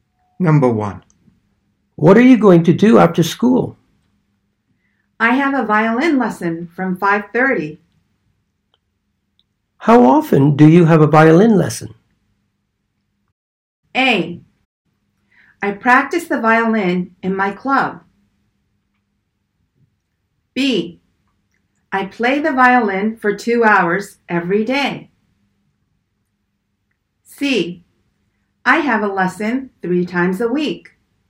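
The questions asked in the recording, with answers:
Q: How often do you have a violin lesson?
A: C: I have a lesson 3 times a week.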